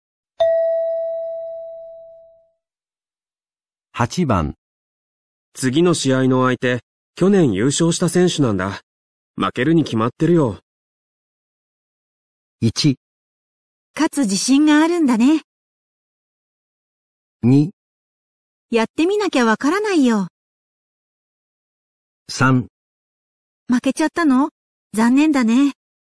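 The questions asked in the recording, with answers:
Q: 次の試合の相手、去年優勝した選手なんだ。負けるに決まってるよ。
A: 2: やってみなきゃわからないよ。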